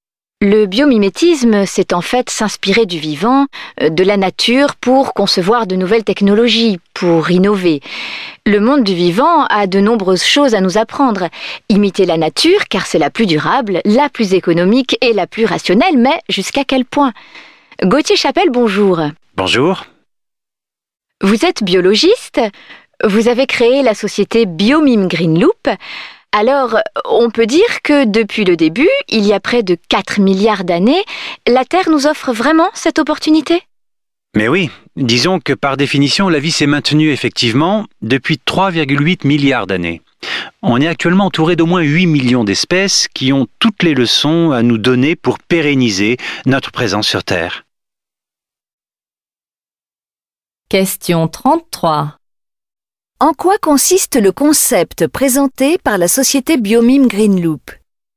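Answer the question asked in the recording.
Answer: S'inspirer du vivant et de la nature pour concevoir de nouvelles technologies et innover.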